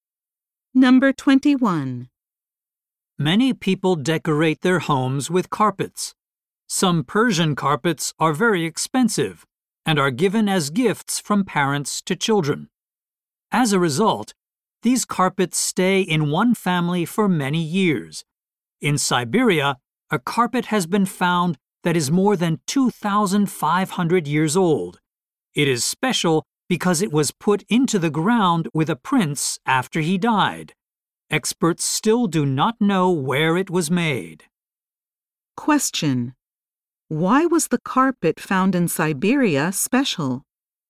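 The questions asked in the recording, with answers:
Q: Why was the carpet found in Siberia special?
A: It was buried with a prince after he died.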